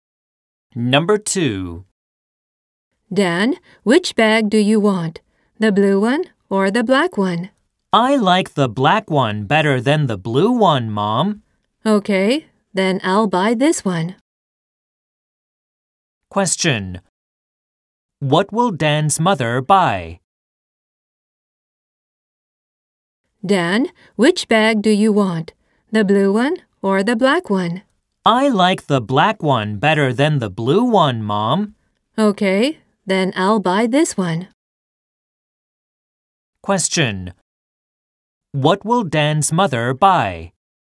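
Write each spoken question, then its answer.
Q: What will Dan's mother buy?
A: The black bag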